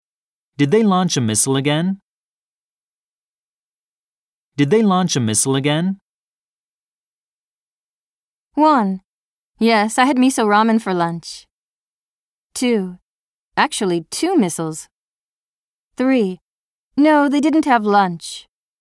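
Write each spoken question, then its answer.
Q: Did they launch a missile again?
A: 2: Actually, 2 missiles.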